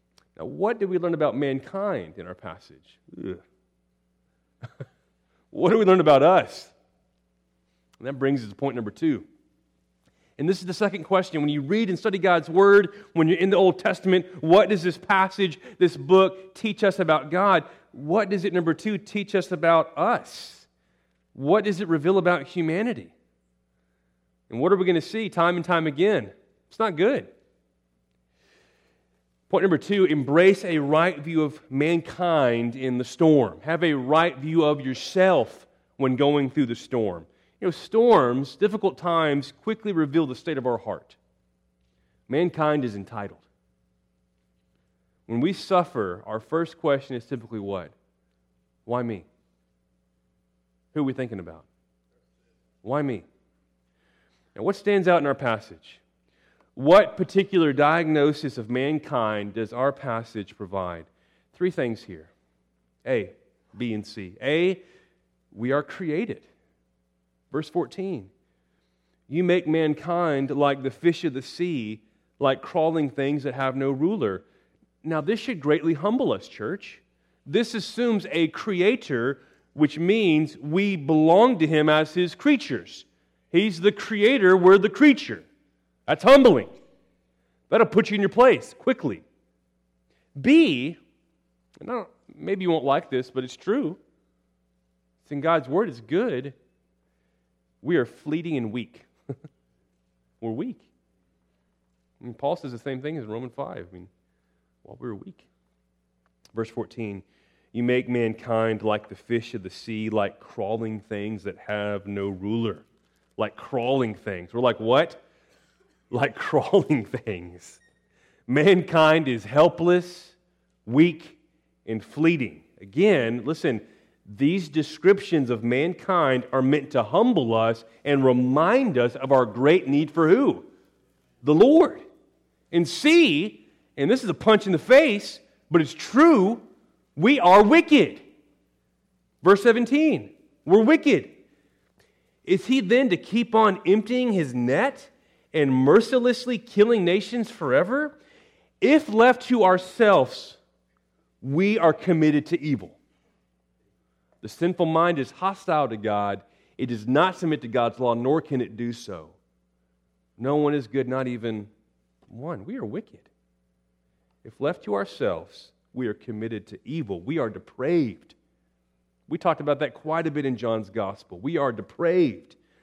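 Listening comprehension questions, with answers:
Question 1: We are _________ (vs. 14)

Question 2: We are fleeting and ________ (vs. 14)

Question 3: We are ___________ (vs. 17)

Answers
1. created
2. weak
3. wicked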